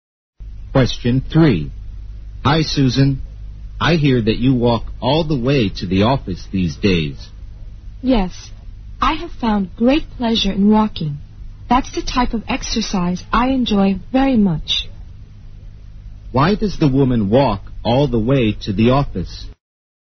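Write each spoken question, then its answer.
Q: Why does the woman walk all the way to the office?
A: She enjoys walking as exercise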